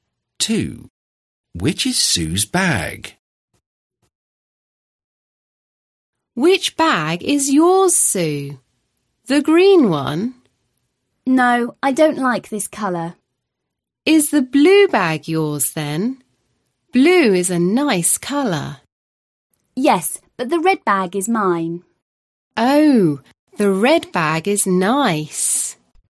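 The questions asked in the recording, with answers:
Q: Which is Sue's bag?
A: The red bag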